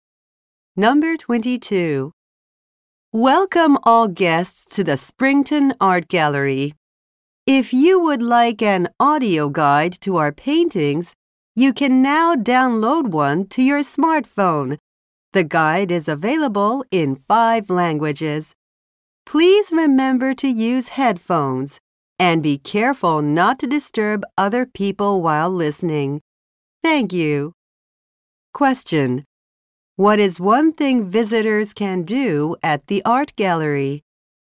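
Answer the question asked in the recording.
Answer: Download an audio guide to their smartphone.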